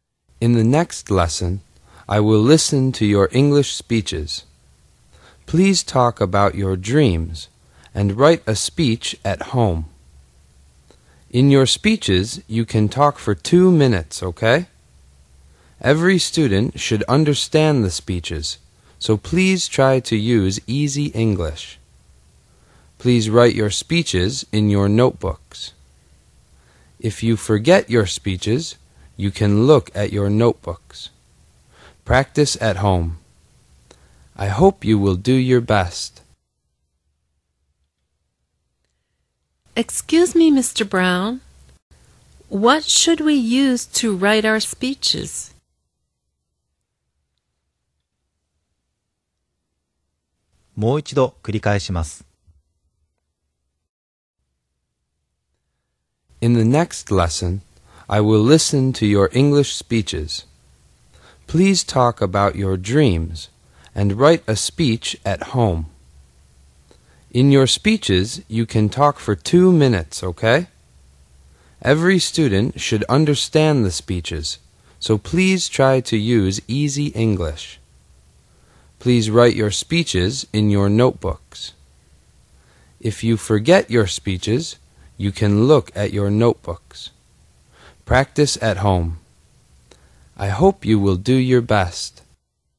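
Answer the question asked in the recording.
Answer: Your notebooks.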